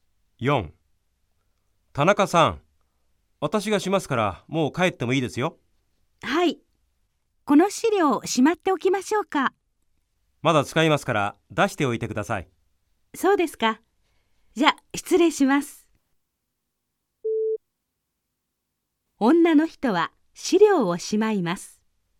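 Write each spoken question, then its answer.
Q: 女の人は資料をしまいます。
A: ×(正しくない)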